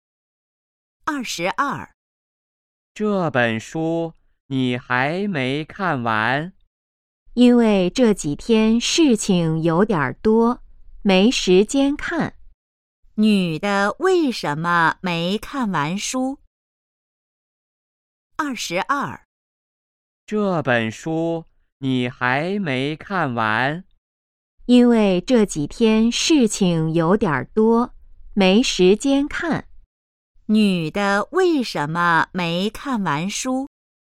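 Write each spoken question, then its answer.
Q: 女的为什么没看完书?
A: 这几天事情有点多,没时间看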